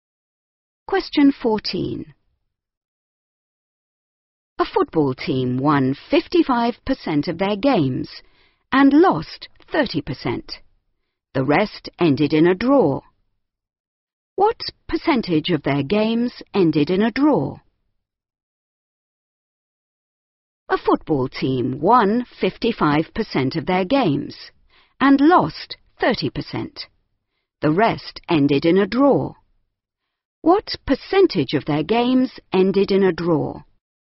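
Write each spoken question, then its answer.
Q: What percentage of their games ended in a draw?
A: 15%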